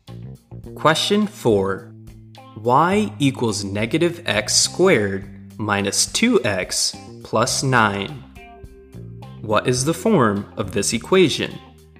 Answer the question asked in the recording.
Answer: This equation is in the standard form.